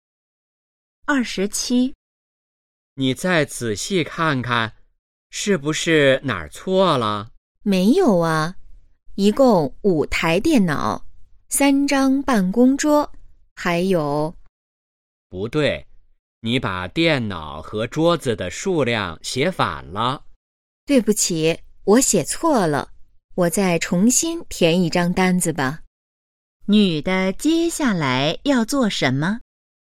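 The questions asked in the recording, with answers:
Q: 女的接下来要做什么?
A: 重新填一张单子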